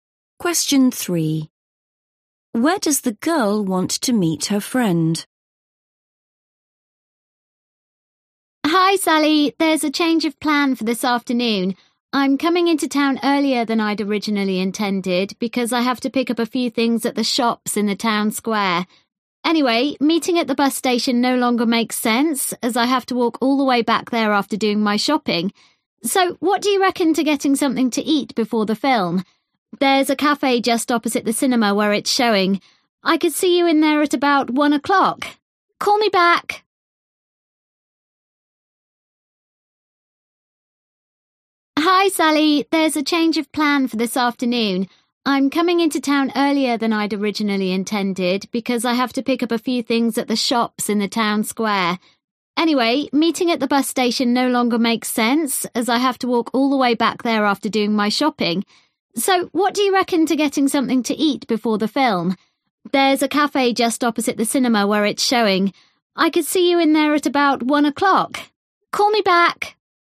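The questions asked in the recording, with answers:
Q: Where does the girl want to meet her friend?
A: at the cafe opposite the cinema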